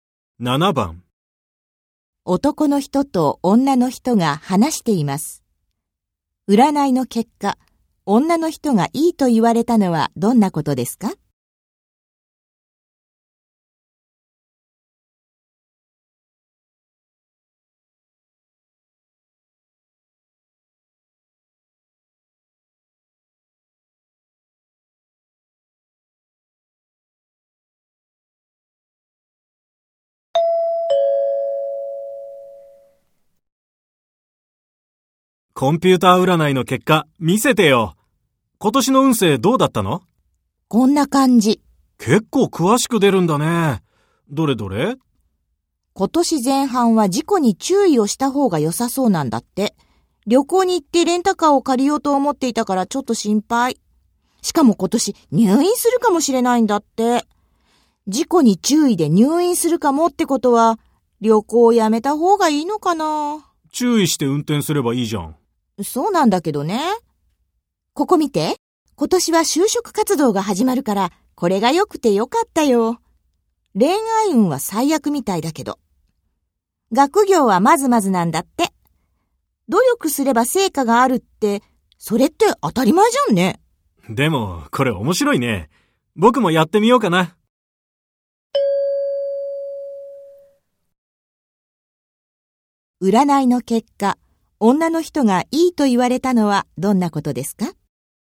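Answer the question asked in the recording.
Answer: 仕事(就職活動)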